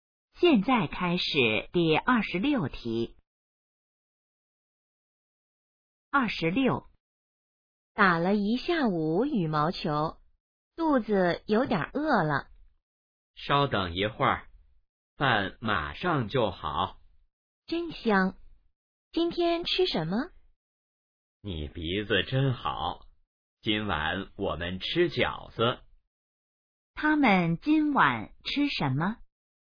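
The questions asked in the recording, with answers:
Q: 他们今晚吃什么?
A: 饺子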